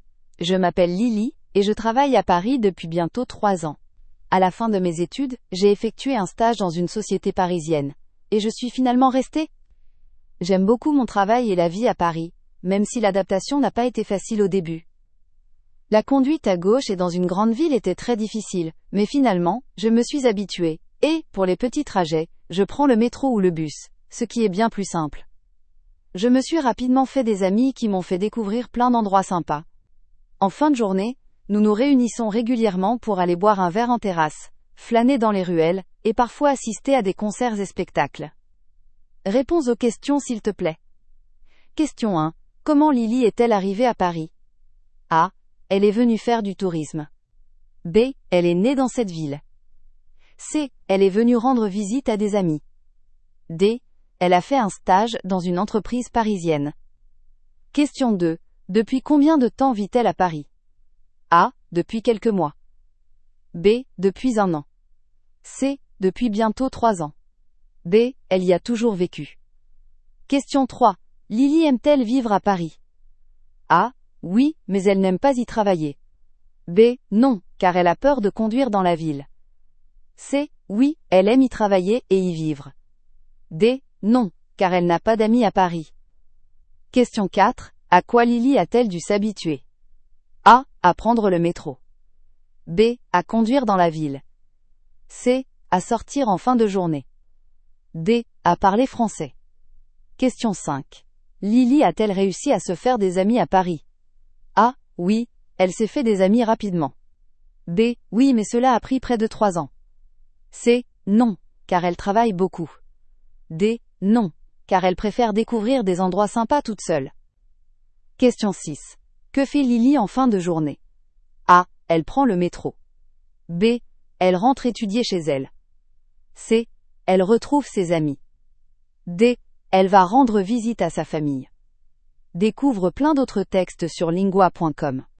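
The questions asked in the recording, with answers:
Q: Comment Lily est-elle arrivée à Paris?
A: D: Elle a fait un stage dans une entreprise parisienne.

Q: Depuis combien de temps vit-elle à Paris?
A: C: Depuis bientôt 3 ans.

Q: Lily aime-t-elle vivre à Paris?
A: C: Oui, elle aime y travailler et y vivre.

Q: À quoi Lily a-t-elle dû s'habituer?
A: B: À conduire dans la ville.

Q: Lily a-t-elle réussi à se faire des amis à Paris?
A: A: Oui, elle s'est fait des amis rapidement.

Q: Que fait Lily en fin de journée?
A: C: Elle retrouve ses amis.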